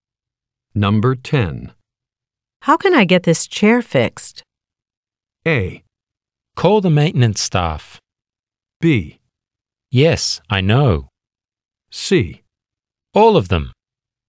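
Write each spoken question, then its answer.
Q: How can I get this chair fixed?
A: A: Call the maintenance staff.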